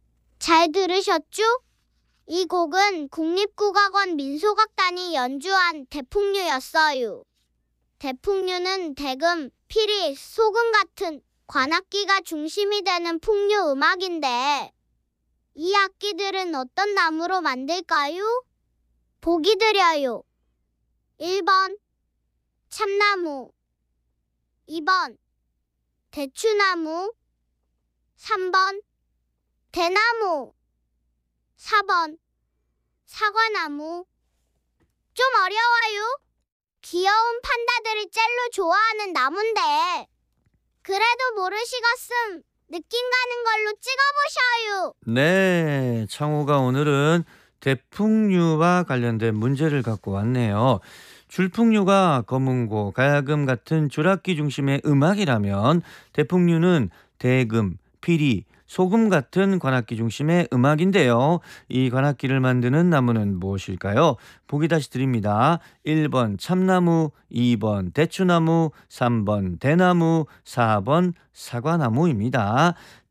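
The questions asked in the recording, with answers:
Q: 대풍류는 대금, 피리, 소금 같은 관악기가 중심이 되는 풍류 음악인데 이 악기들은 어떤 나무로 만들까요?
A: 3번: 대나무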